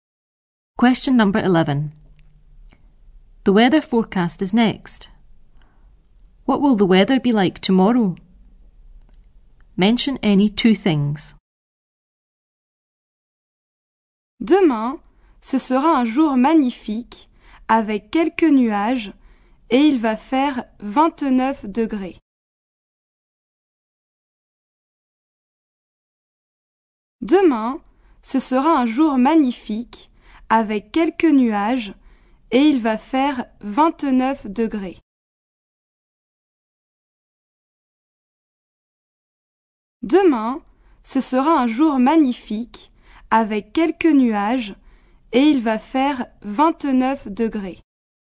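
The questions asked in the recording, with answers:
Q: What will the weather be like tomorrow?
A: A beautiful day, a few clouds, 29 degrees (any two)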